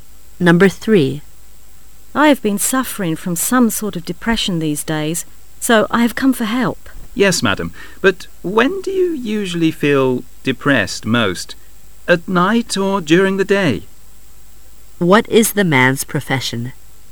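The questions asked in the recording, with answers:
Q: What is the man's profession?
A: A doctor (psychiatrist)

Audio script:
[解析] W:I have been suffering from some sort of depression these days,so I have come for help. M:Yes,madam.But when do you usually feel depressed most,at night or during the day? Q:What is the man's profession?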